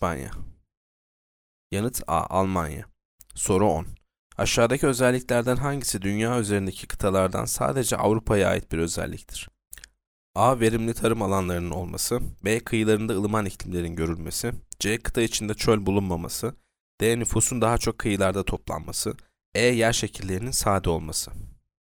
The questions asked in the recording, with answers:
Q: Aşağıdaki özelliklerden hangisi dünya üzerindeki kıtalardan sadece Avrupa'ya ait bir özelliktir?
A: Yanıt C. Kıta içinde çöl bulunmaması.